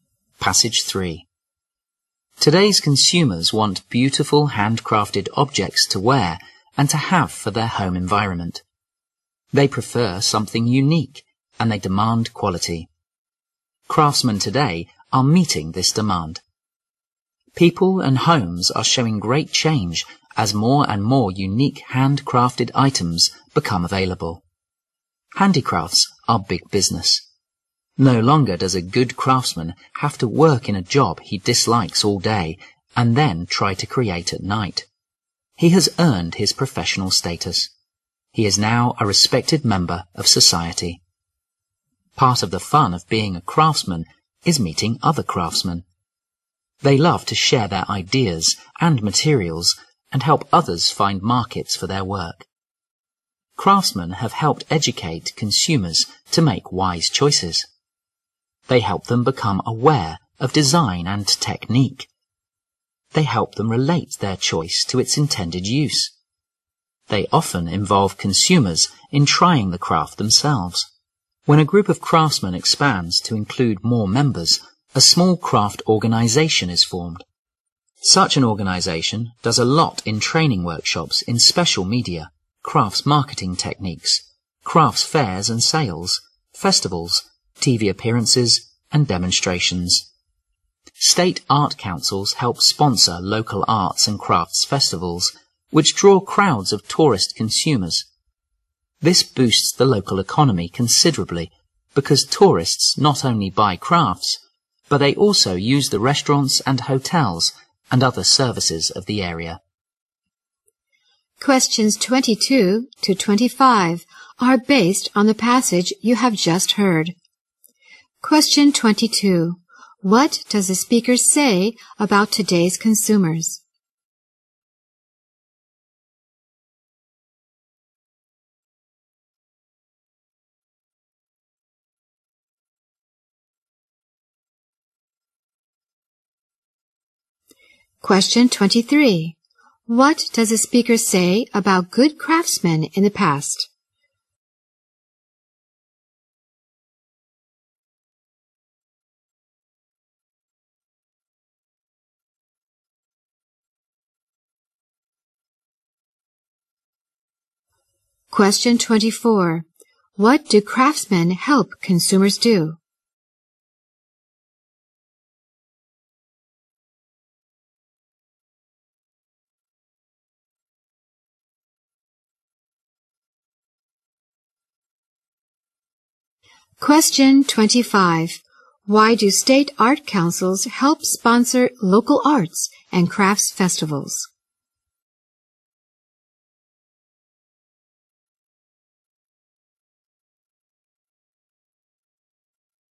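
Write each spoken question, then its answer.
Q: What does the speaker say about today's consumers?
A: They want unique, quality handcrafted items

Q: What does the speaker say about good craftsmen in the past?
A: They worked in jobs they disliked and created at night

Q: What do craftsmen help consumers do?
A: Make wise choices

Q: Why do state art councils help sponsor local arts and crafts festivals?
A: To boost the local economy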